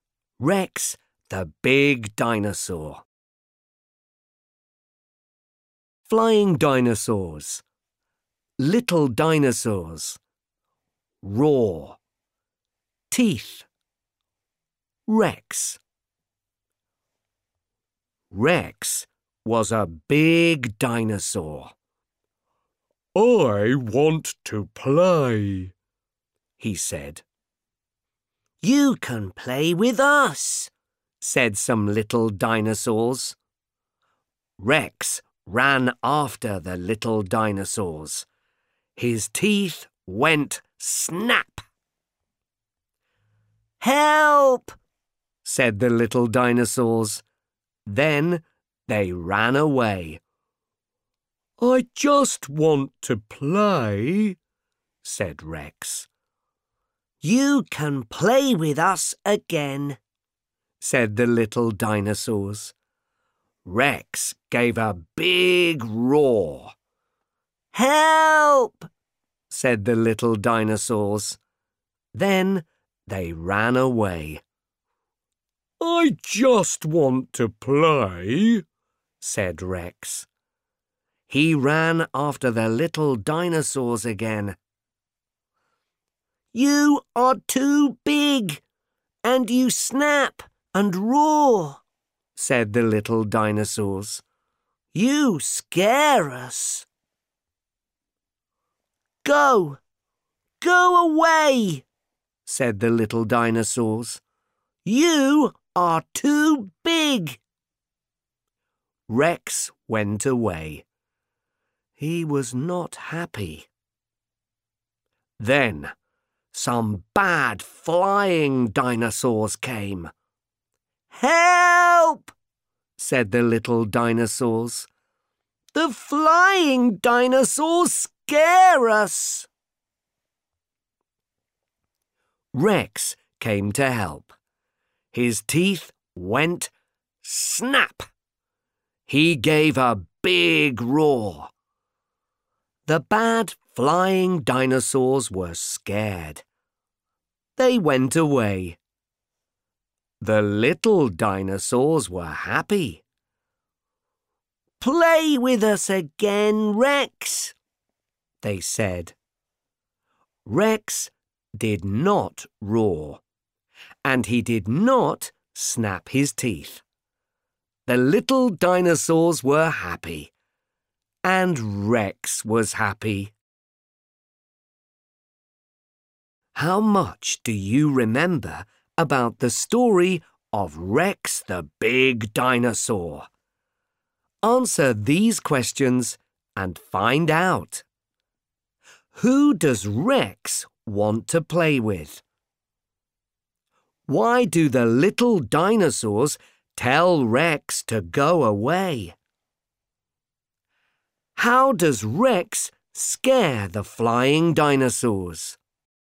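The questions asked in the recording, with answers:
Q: Who does Rex want to play with?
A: The little dinosaurs

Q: Why do the little dinosaurs tell Rex to go away?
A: He is too big, and he snaps and roars, so he scares them

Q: How does Rex scare the flying dinosaurs?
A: His teeth went snap and he gave a big roar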